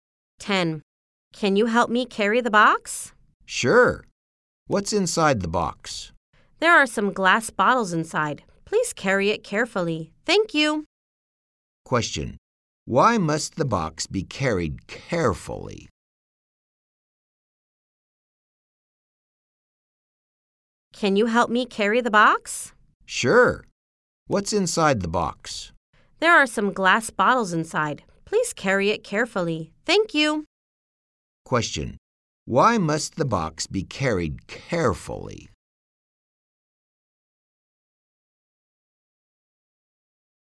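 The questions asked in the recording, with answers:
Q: Why must the box be carried carefully?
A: There are glass bottles inside.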